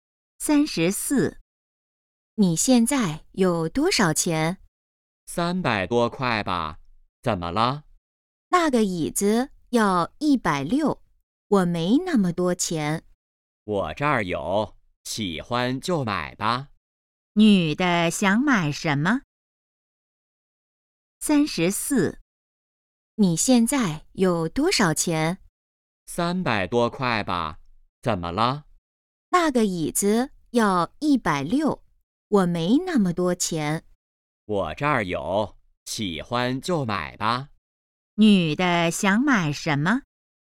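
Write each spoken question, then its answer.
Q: 女的想买什么?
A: 椅子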